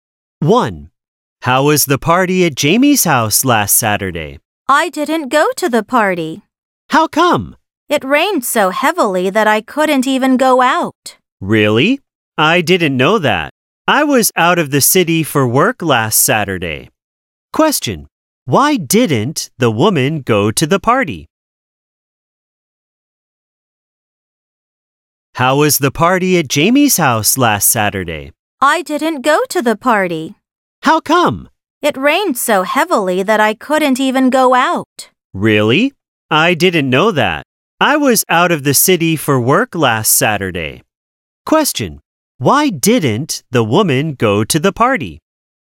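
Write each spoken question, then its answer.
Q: Why didn't the woman go to the party?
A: It rained so heavily that she couldn't go out.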